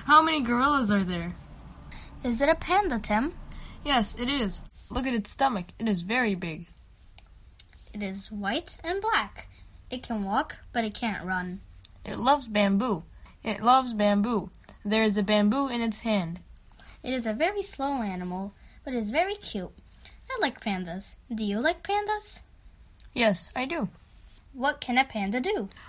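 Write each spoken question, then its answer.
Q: What can a panda do?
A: It can walk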